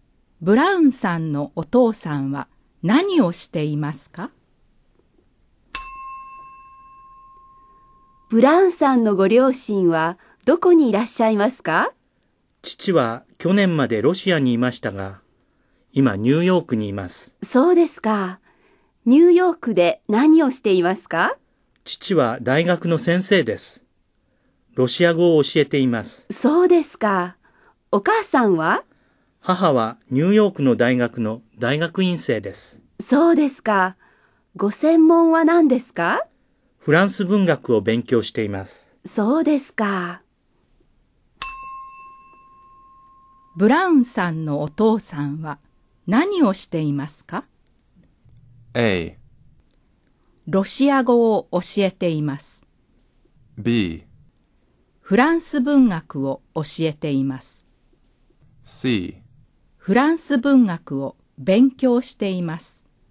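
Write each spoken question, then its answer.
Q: ブラウンさんのお父さんは何をしていますか?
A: A: ロシア語を教えています。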